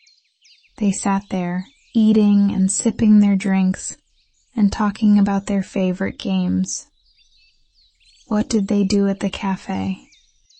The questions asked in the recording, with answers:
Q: What did they do at the cafe?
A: They sat, ate, sipped their drinks, and talked about their favorite games.